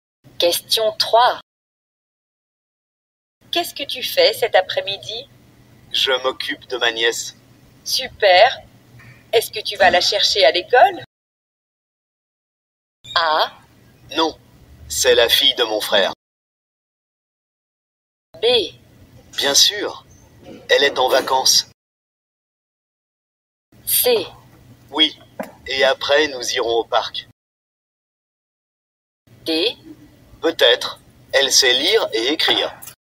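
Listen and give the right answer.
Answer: C: Oui, et après nous irons au parc.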